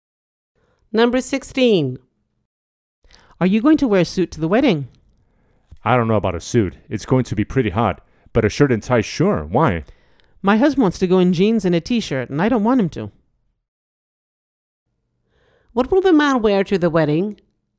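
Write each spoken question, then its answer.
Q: What will the man wear to the wedding?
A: A shirt and tie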